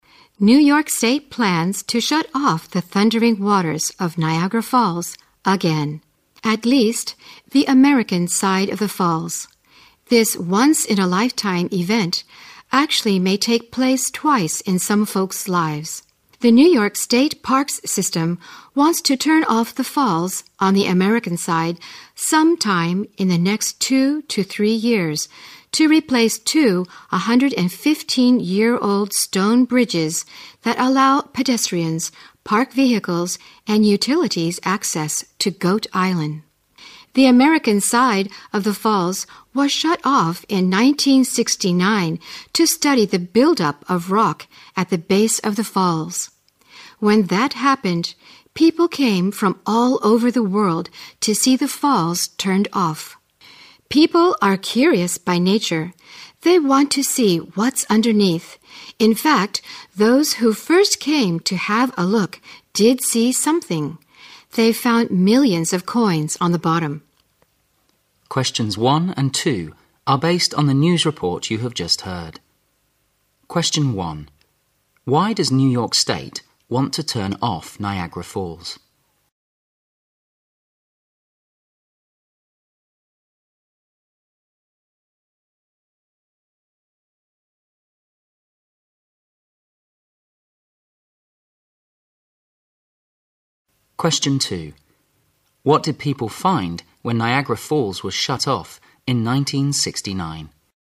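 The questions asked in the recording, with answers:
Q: Why does New York State want to turn off Niagara Falls?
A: To replace two 115-year-old stone bridges to Goat Island.

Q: What did people find when Niagara Falls was shut off in 1969?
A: Millions of coins on the bottom.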